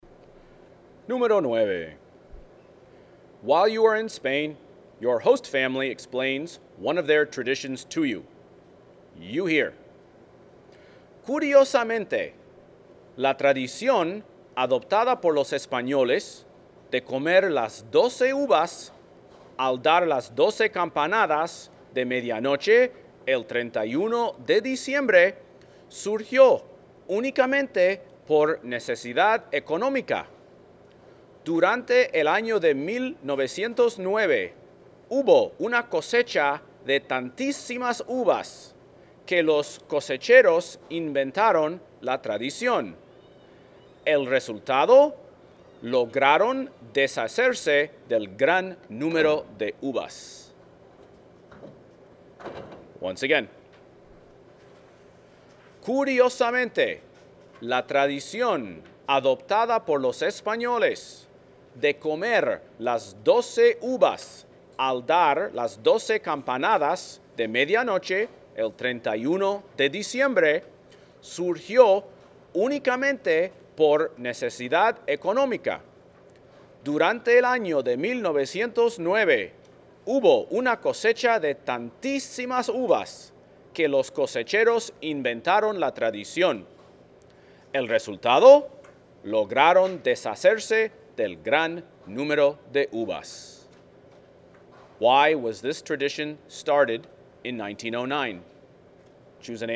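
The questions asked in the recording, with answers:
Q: Why was this tradition started in 1909?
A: To get rid of a huge surplus of grapes from the harvest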